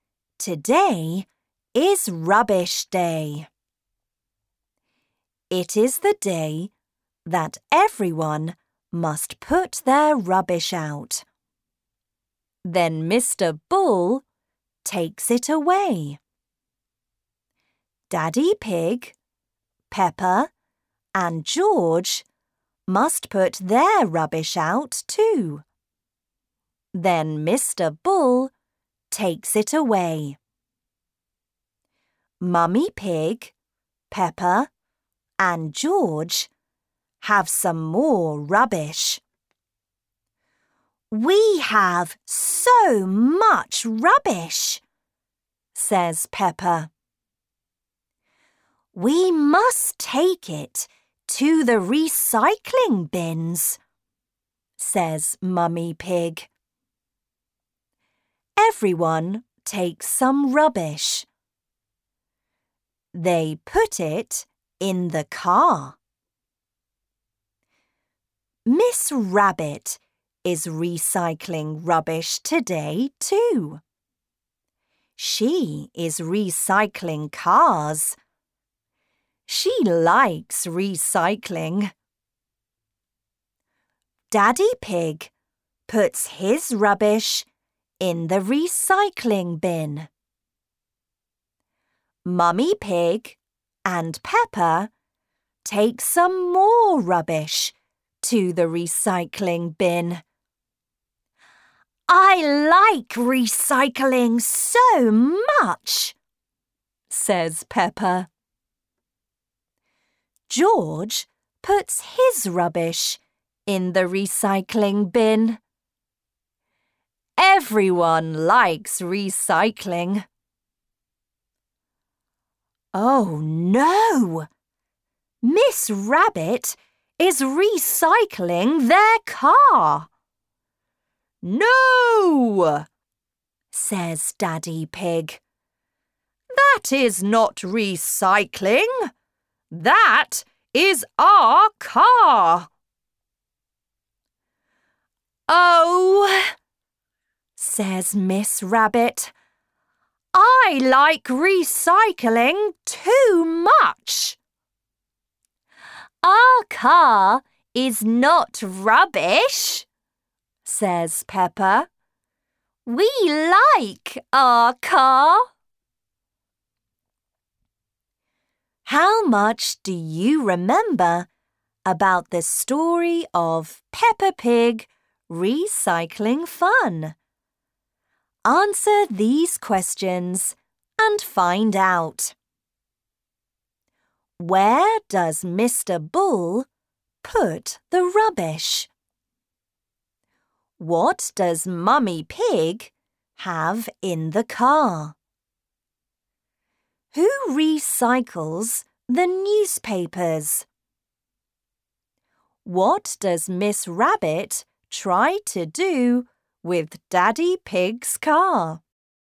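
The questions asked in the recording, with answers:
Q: What does Miss Rabbit try to do with Daddy Pig's car?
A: Recycle it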